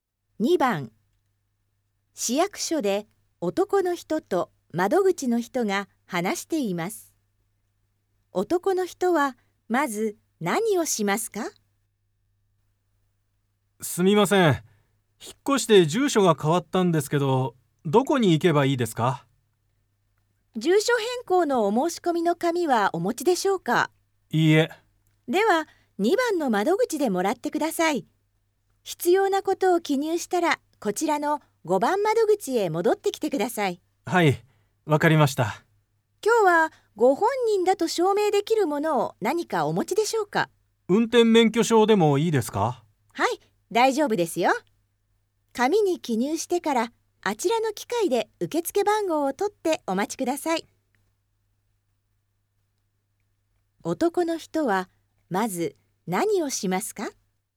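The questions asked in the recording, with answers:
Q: 男の人はまず何をしますか?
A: 2番の窓口で住所変更の申し込みの紙をもらう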